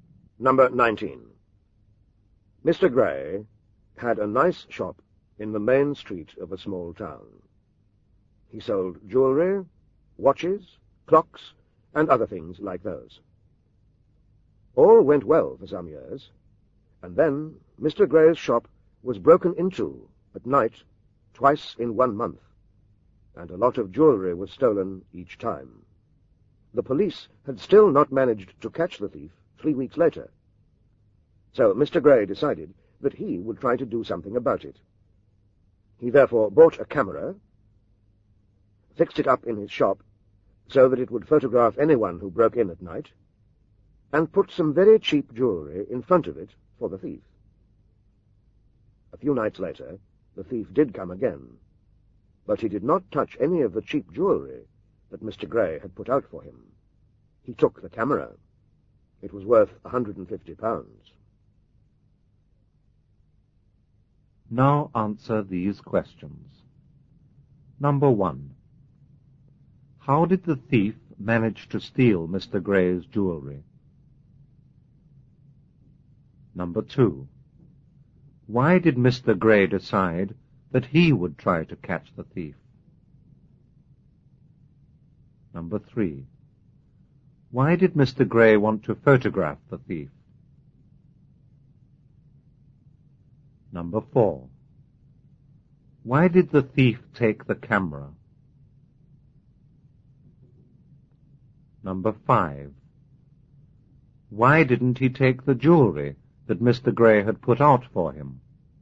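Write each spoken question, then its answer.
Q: How did the thief manage to steal Mr. Gray's jewelry?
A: He broke into the shop at night.

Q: Why did Mr. Gray decide that he would try to catch the thief?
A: The police still hadn't caught the thief three weeks later.

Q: Why did the thief take the camera?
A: It was valuable, worth £150.

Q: Why didn't he take the jewelry that Mr. Gray had put out for him?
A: It was very cheap.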